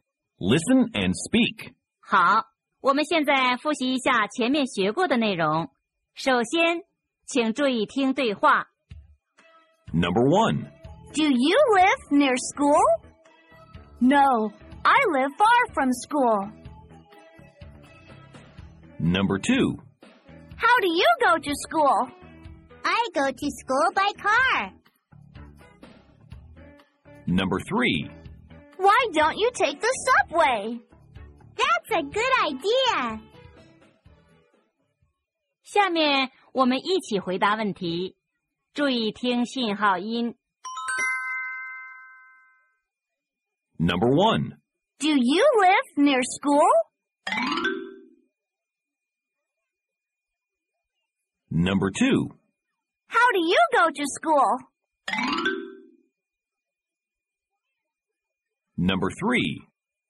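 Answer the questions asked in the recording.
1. No, I live far from school.
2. I go to school by car.
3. That's a good idea.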